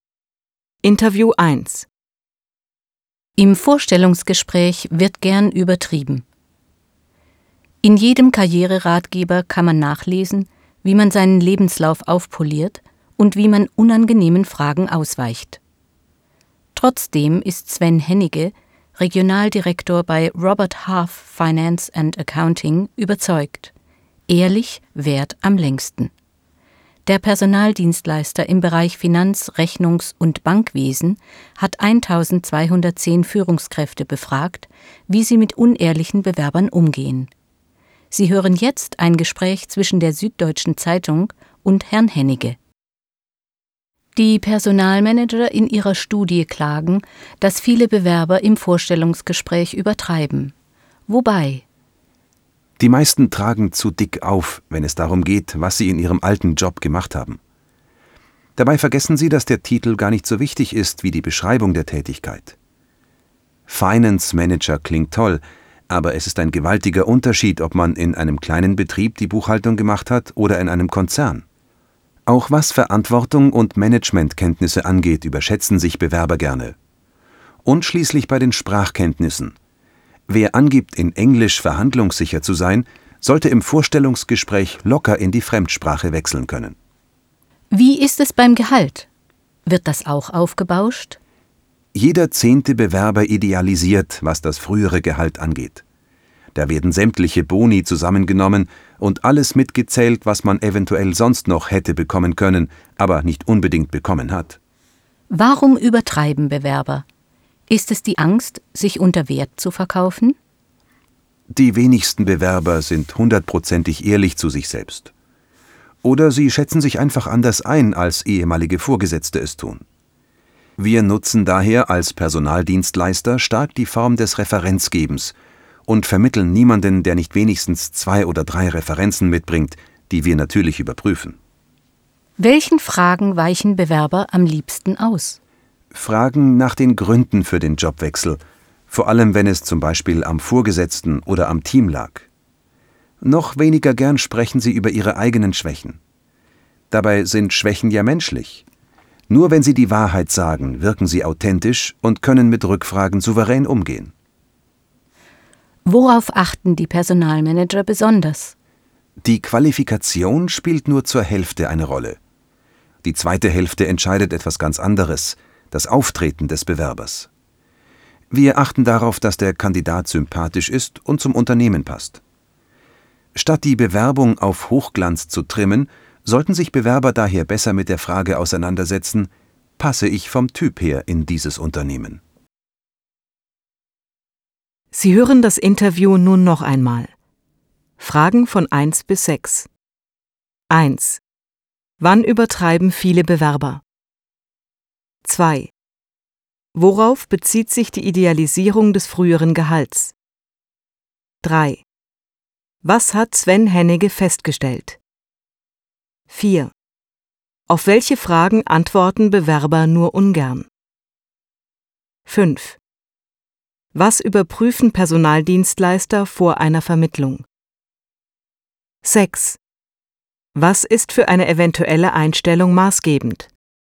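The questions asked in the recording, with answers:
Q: Wann übertreiben viele Bewerber?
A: Im Vorstellungsgespräch

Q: Worauf bezieht sich die Idealisierung des früheren Gehalts?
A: Alle Boni und mögliche Zusatzleistungen werden mitgezählt

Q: Auf welche Fragen antworten Bewerber nur ungern?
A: Nach den Gründen für den Jobwechsel und nach eigenen Schwächen

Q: Was überprüfen Personaldienstleister vor einer Vermittlung?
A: Die Referenzen

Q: Was ist für eine eventuelle Einstellung maßgebend?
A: Qualifikation und Auftreten je zur Hälfte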